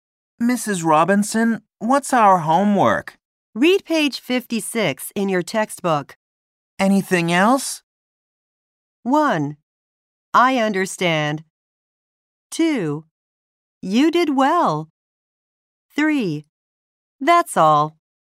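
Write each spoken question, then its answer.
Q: Anything else?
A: 3: That's all.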